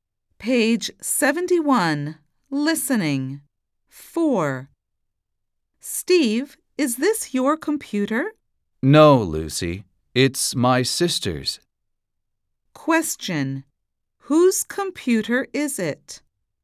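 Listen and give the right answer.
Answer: Steve's sister's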